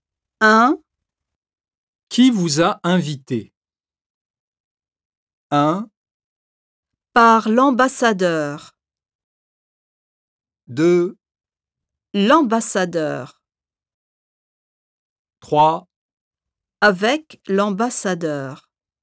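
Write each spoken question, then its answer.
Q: Qui vous a invité?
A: 2: L'ambassadeur.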